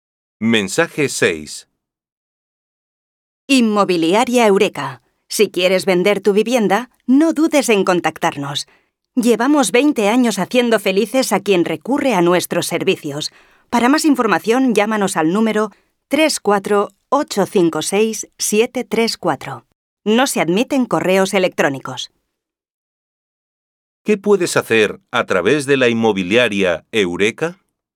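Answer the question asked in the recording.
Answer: Vender tu vivienda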